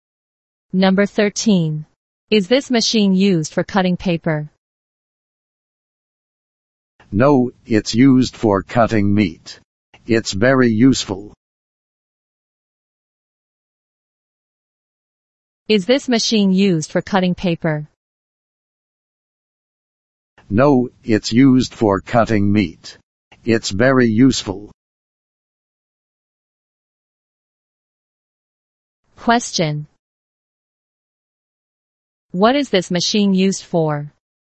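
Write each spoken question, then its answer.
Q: What is this machine used for?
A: Cutting meat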